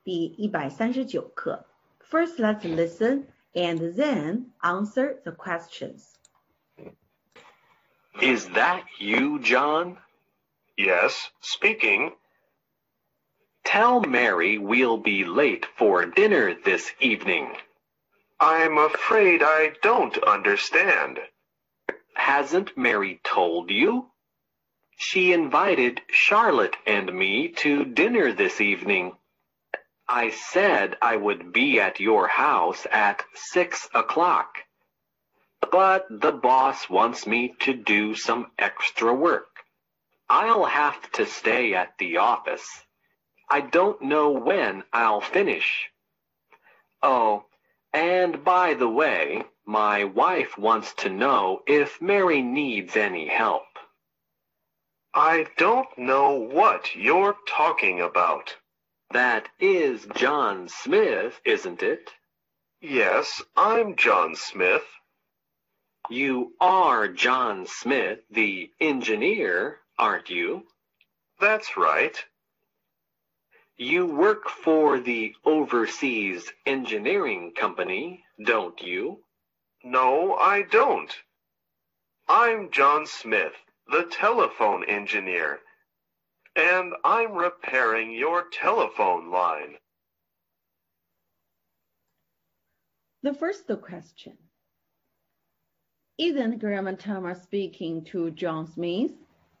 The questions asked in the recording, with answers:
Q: Isn't Grandma Tama speaking to John Smith?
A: Yes, he is.